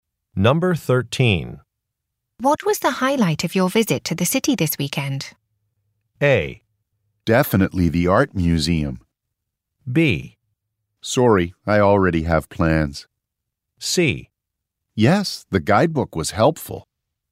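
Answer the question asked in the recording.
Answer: A: Definitely the art museum.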